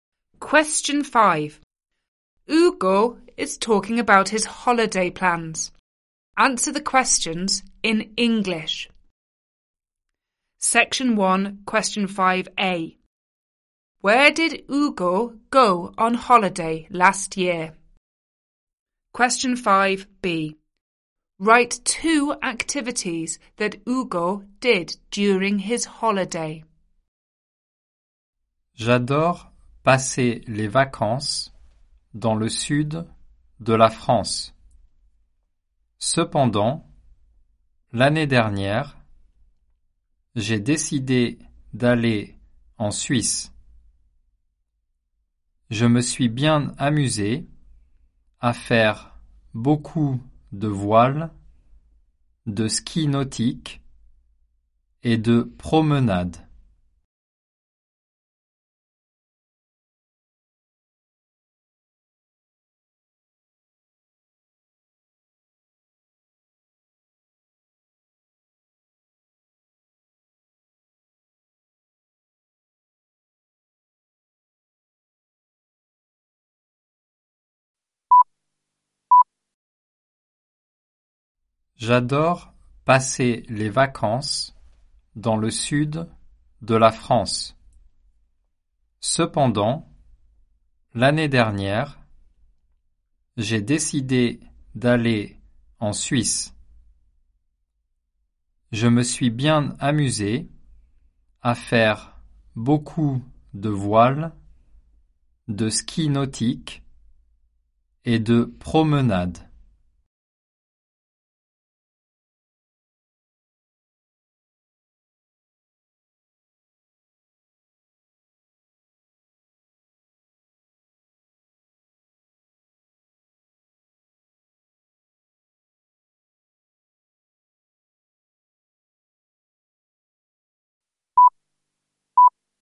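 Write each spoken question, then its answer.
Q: Where did Hugo go on holiday last year?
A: Switzerland

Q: Write two activities that Hugo did during his holiday.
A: Two of: sailing, water-skiing, walks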